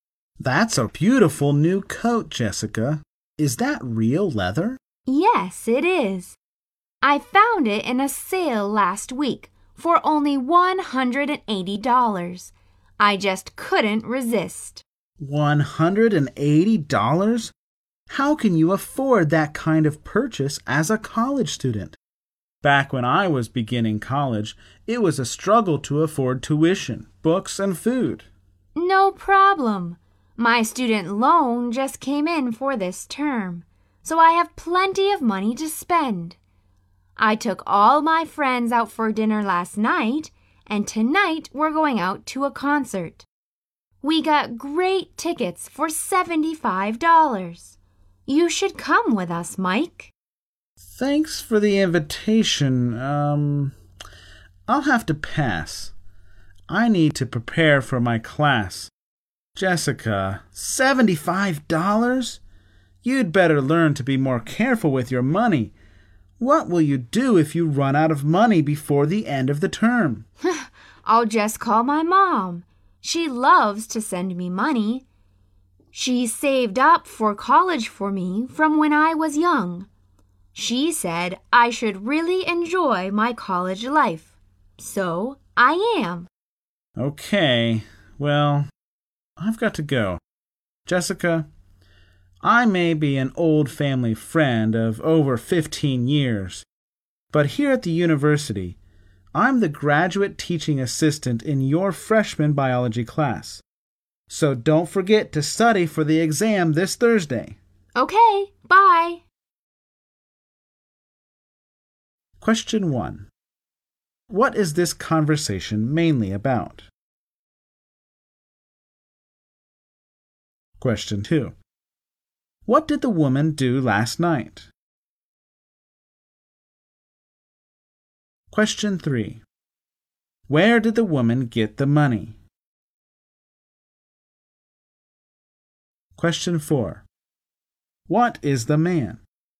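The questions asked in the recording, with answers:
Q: what did the woman do last night?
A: She took her friends out for dinner

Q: Where did the woman get the money?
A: From her student loan

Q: What is the man?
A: A graduate teaching assistant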